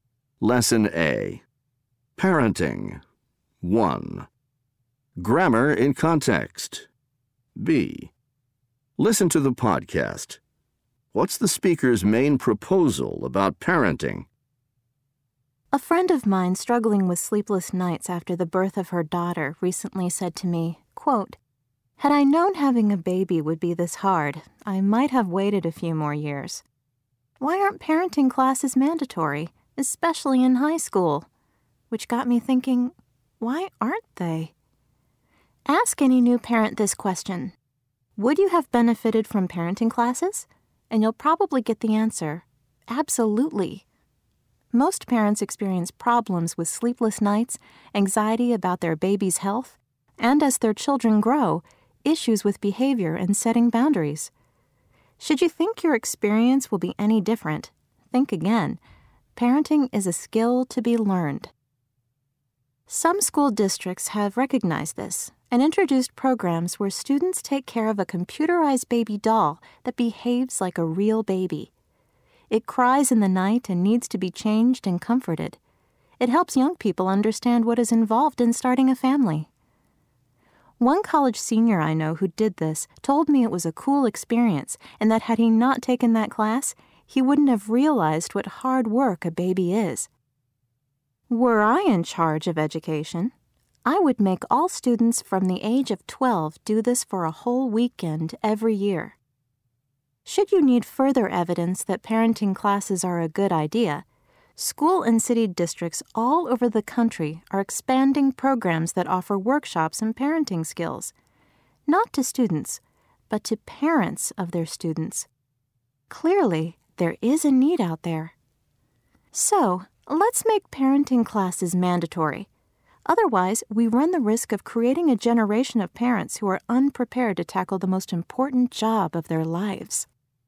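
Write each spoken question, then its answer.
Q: What's the speaker's main proposal about parenting?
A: Parenting classes should be mandatory, especially in high school.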